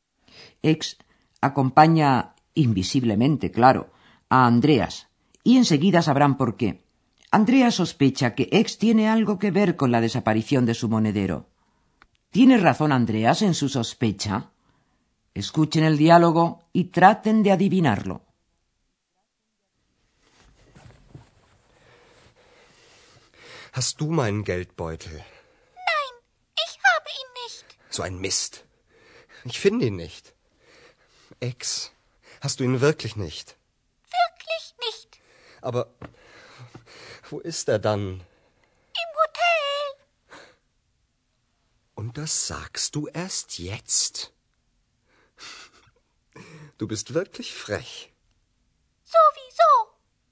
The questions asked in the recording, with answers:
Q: ¿Tiene razón Andreas en su sospecha?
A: Lo cierto es que Ex no tiene el monedero, pero sí que se había dado cuenta de que Andreas lo había olvidado en el hotel y sin embargo no le dijo nada.